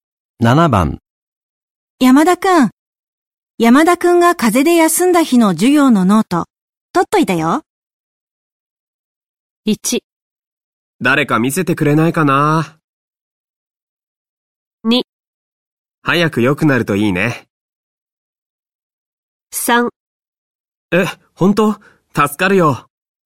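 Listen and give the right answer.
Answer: 3: え、本当?助かるよ。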